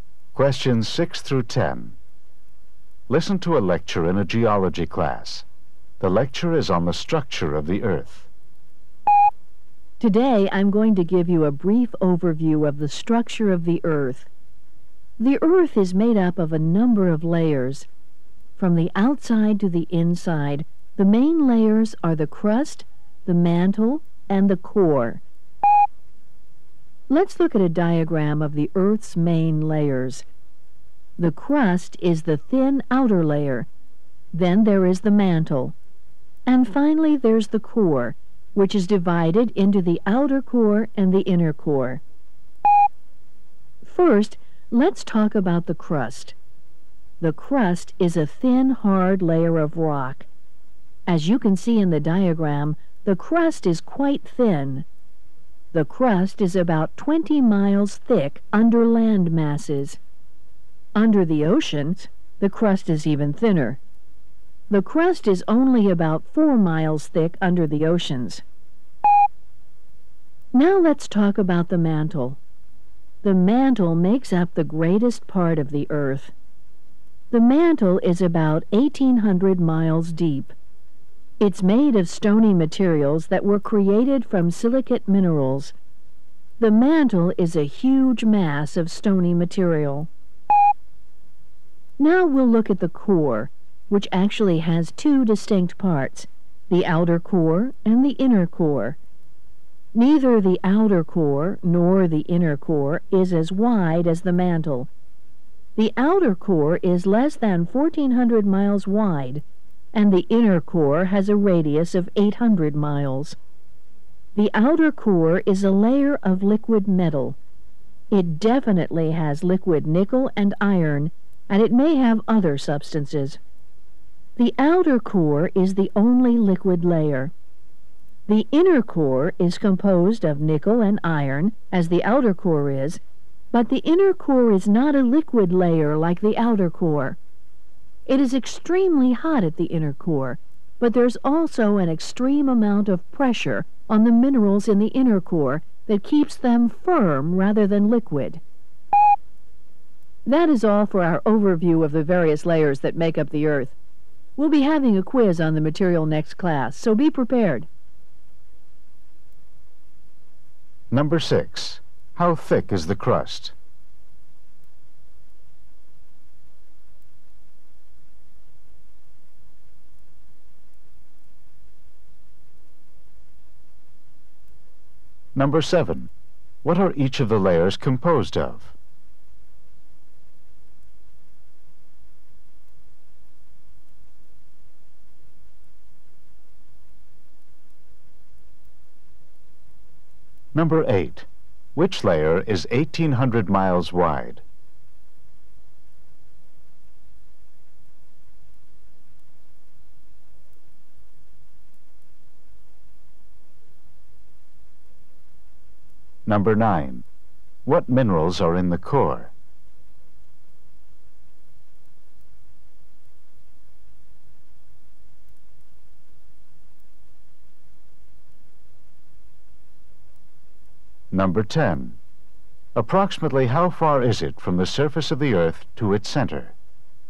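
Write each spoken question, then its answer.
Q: How thick is the crust?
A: About 20 miles under land, about 4 miles under the oceans

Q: Which layer is 1,800 miles wide?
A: The mantle

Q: What minerals are in the core?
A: Nickel and iron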